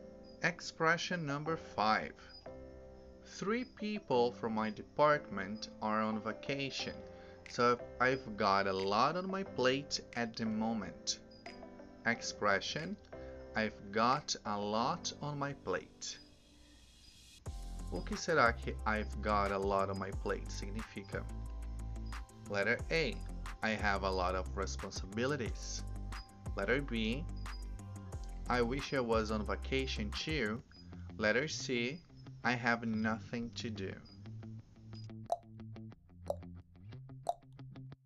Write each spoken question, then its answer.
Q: O que será que I've got a lot on my plate significa?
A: Answer. Letter A. I have a lot of responsibilities.